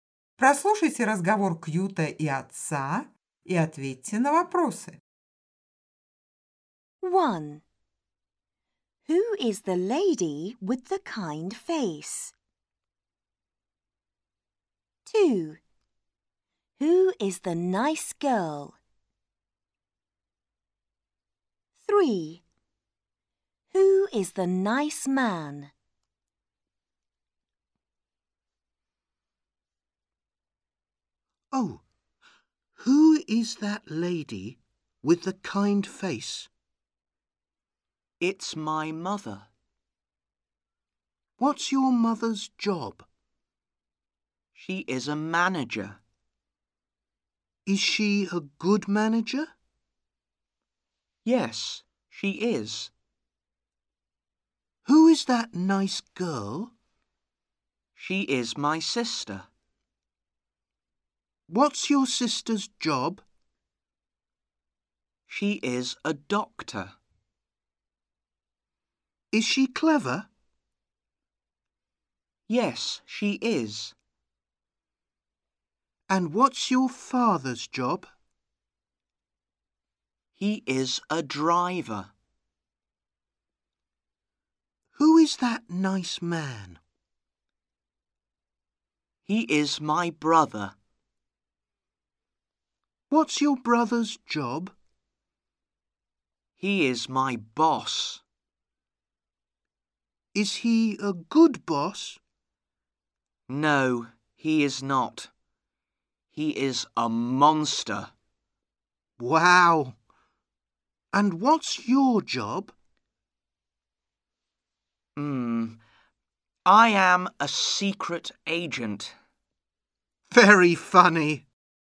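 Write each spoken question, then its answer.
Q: Who is the lady with the kind face?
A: His mother

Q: Who is the nice girl?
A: His sister

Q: Who is the nice man?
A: His brother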